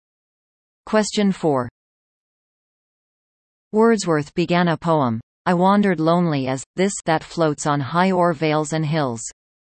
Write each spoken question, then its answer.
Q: Wordsworth began a poem, I wandered lonely as, this, that floats on high o'er vales and hills.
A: Answer. A cloud.